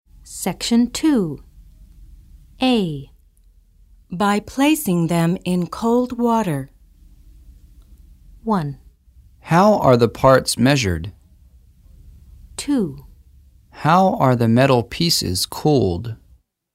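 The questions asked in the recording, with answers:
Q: By placing them in cold water.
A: 2: How are the metal pieces cooled?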